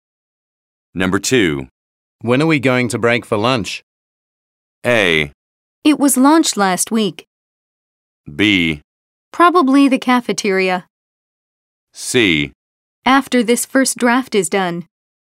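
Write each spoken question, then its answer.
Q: When are we going to break for lunch?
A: C: After this first draft is done.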